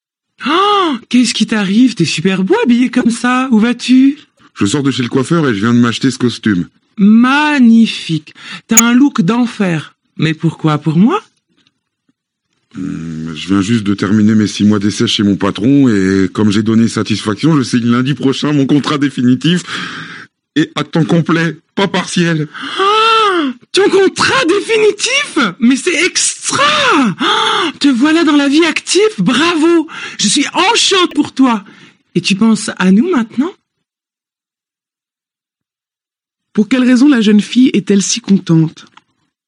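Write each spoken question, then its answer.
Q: Pour quelle raison la jeune fille est-elle si contente?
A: Parce que son ami va signer son contrat définitif à temps complet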